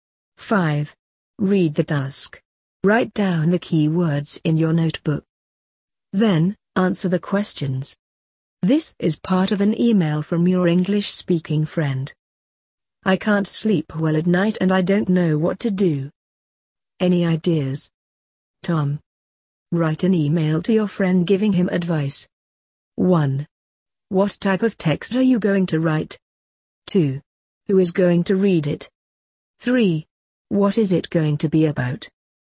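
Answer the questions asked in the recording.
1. An email
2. My English-speaking friend, Tom
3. Giving Tom advice because he can't sleep well at night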